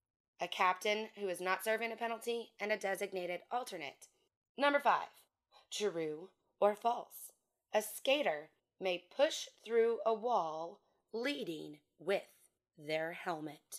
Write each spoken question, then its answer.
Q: A skater may push through a wall leading with their helmet.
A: This is false.